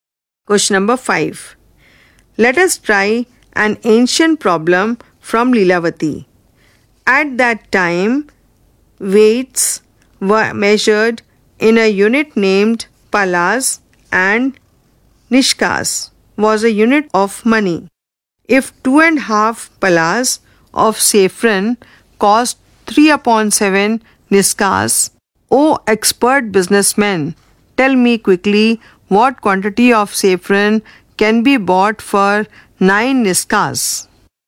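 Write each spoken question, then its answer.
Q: If 2.5 palas of saffron cost 3/7 nishkas, O expert businessman, tell me quickly what quantity of saffron can be bought for 9 nishkas.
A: 52.5 palas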